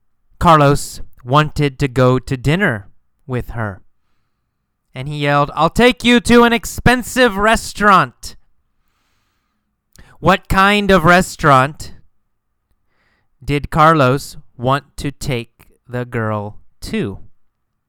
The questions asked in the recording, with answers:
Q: What kind of restaurant did Carlos want to take the girl to?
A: What kind? An expensive restaurant, right?